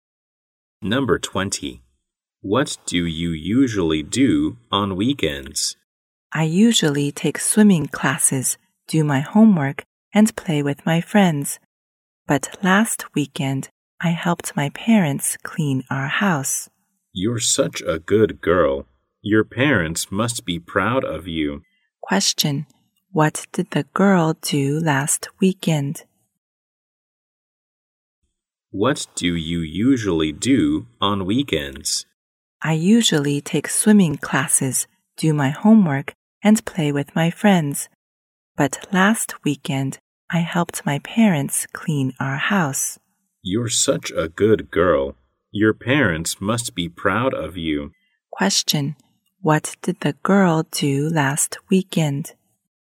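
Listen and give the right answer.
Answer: She helped her parents clean the house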